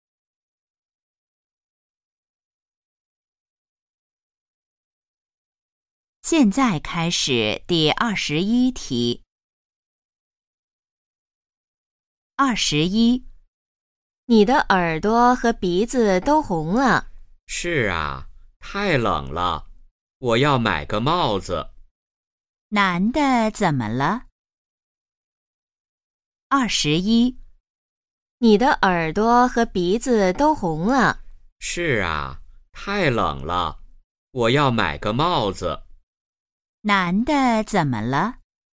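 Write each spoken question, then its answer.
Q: 男的怎么了?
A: 他很冷,耳朵和鼻子都红了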